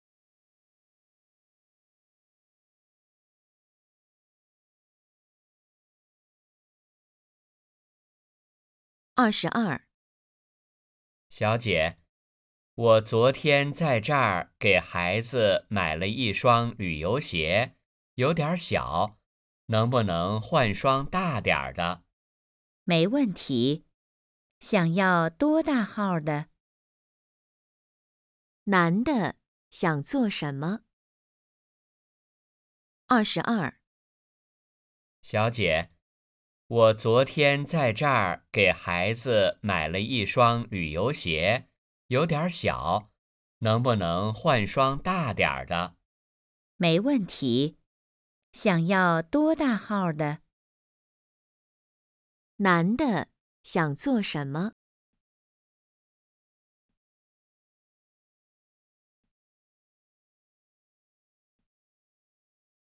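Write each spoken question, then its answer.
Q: 男的想做什么?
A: 换一双大点的鞋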